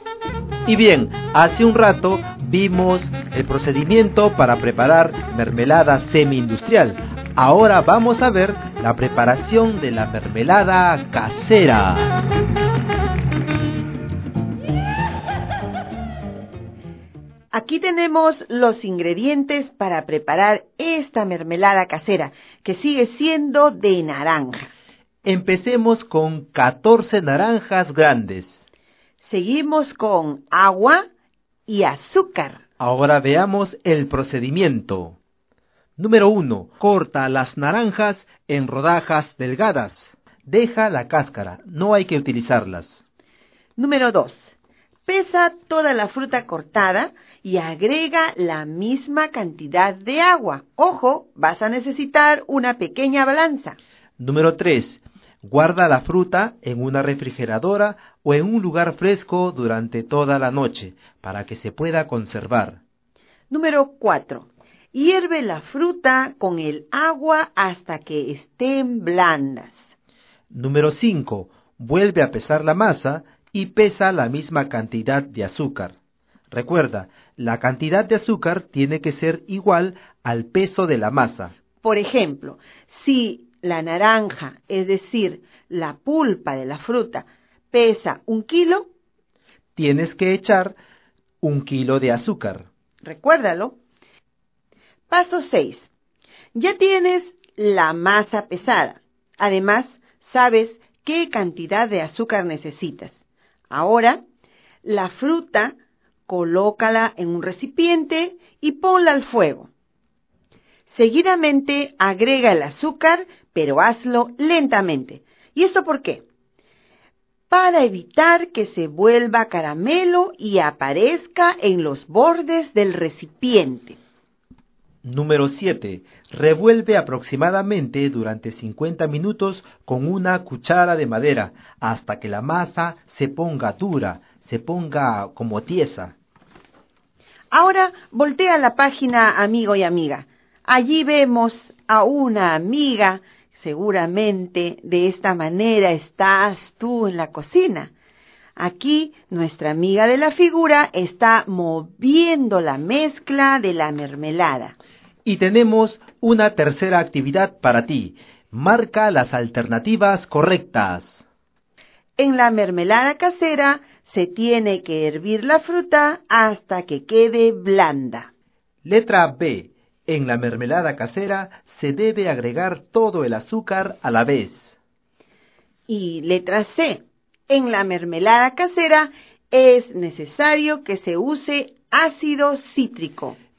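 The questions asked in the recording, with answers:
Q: En la mermelada casera se tiene que hervir la fruta hasta que quede blanda.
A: Correcta

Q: Letra B. En la mermelada casera se debe agregar todo el azúcar a la vez.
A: Incorrecta

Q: Y letra C. En la mermelada casera es necesario que se use ácido cítrico.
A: Incorrecta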